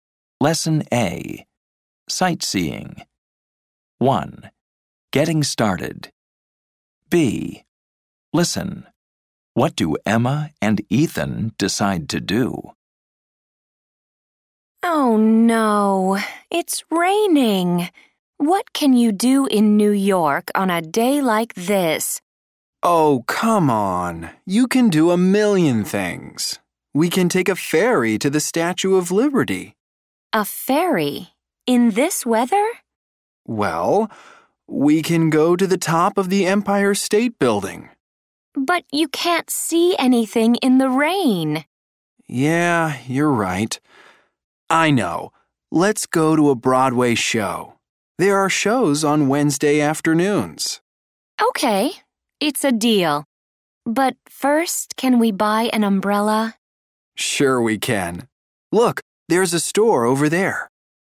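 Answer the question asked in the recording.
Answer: Go to a Broadway show (after buying an umbrella)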